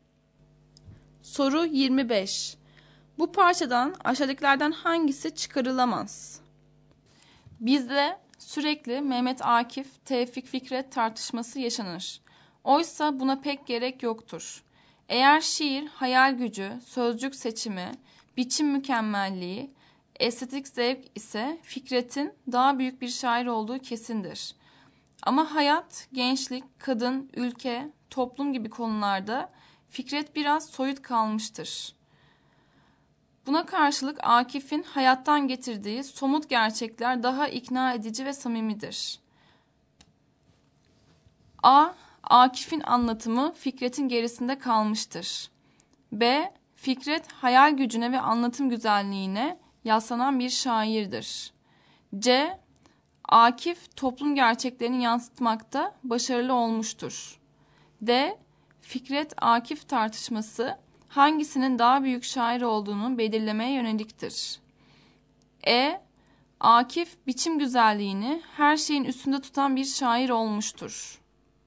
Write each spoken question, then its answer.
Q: Bu parçadan aşağıdakilerden hangisi çıkarılamaz?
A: Doğru yanıt E şıkkı.